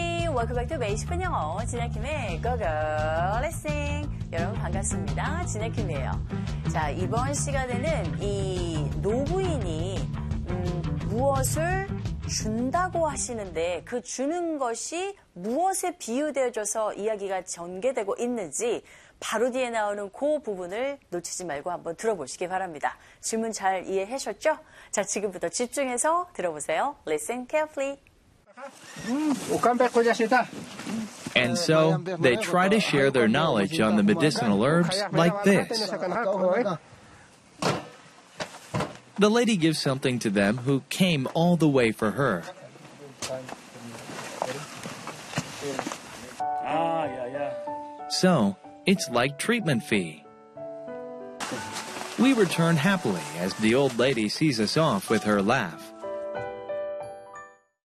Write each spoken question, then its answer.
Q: 자, 이번 시간에는 이 노부인이 무엇을 준다고 하시는데 그 주는 것이 무엇에 비유되어져서 이야기가 전개되고 있는지 바로 뒤에 나오는 그 부분을 놓치지 말고 한번 들어보시기 바랍니다.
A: 네, 맞아요. It's like a treatment fee 라고 이 부분을 캐치하셨으면 됩니다.